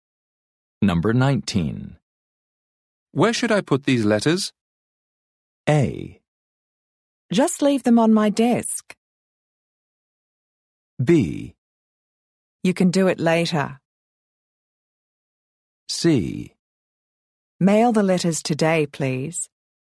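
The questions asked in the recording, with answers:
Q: Where should I put these letters?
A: A: Just leave them on my desk.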